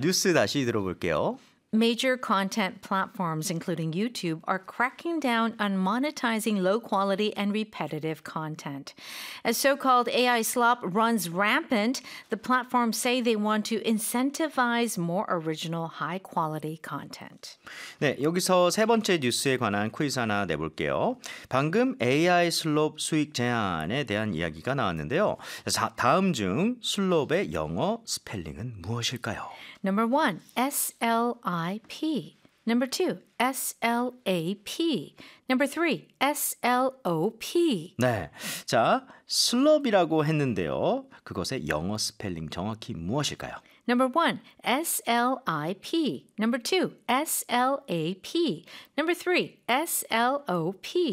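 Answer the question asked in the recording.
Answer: 3: S-L-O-P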